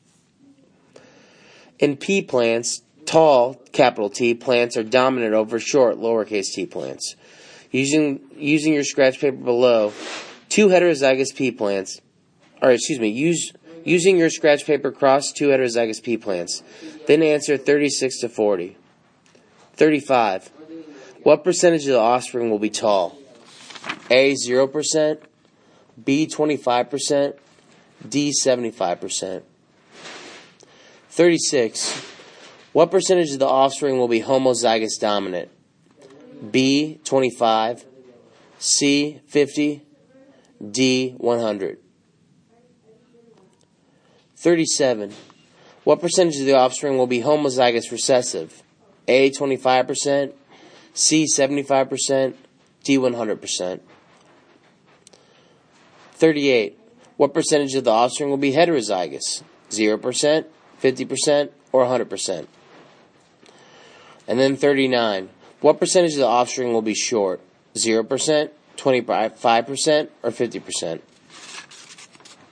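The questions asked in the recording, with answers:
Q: What percentage of the offspring will be tall?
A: D: 75%

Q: What percentage of the offspring will be homozygous dominant?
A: B: 25

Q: What percentage of the offspring will be homozygous recessive?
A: A: 25%

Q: What percentage of the offspring will be heterozygous?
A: 50%

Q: What percentage of the offspring will be short?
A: 25%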